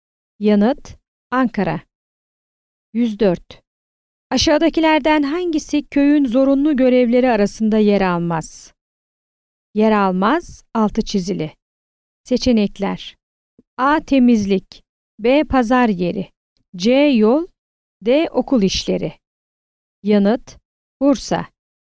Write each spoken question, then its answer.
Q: Aşağıdakilerden hangisi köyün zorunlu görevleri arasında yer almaz?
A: Yanıt: Bursa.